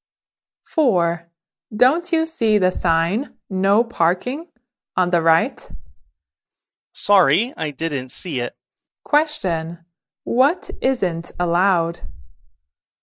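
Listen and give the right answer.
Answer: Parking.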